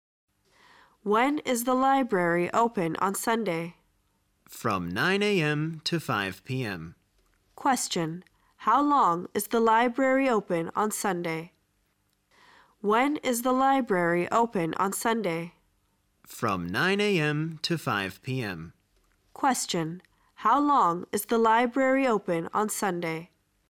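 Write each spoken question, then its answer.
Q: How long is the library open on Sunday?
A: Eight hours (from 9 a.m. to 5 p.m.)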